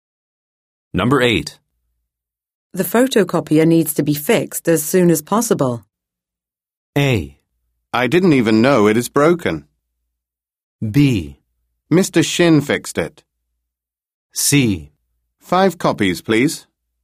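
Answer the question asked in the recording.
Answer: A: I didn't even know it is broken.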